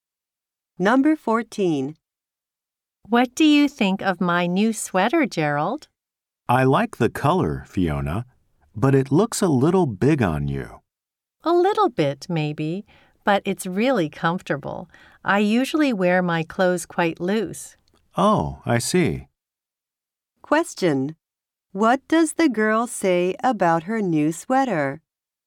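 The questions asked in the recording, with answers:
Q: What does the girl say about her new sweater?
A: It is really comfortable.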